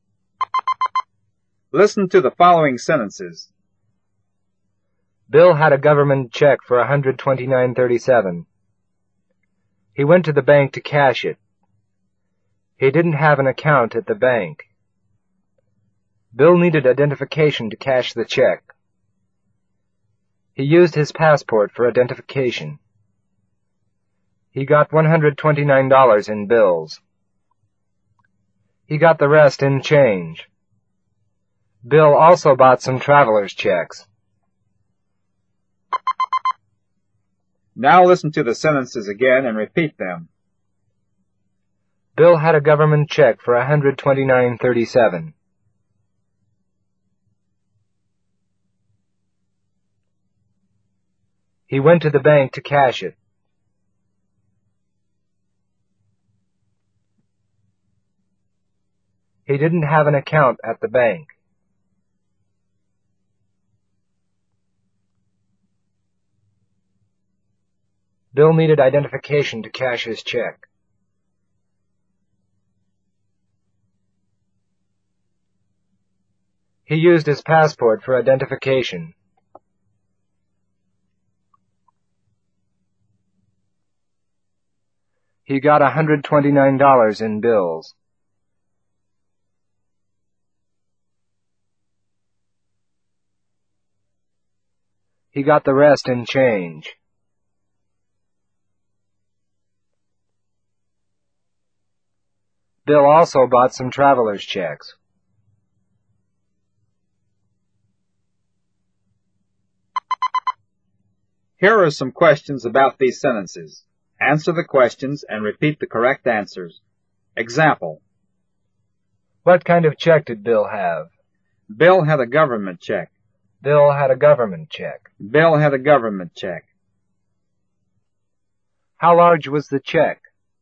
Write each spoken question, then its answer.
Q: How large was the check?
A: The check was for $129.37.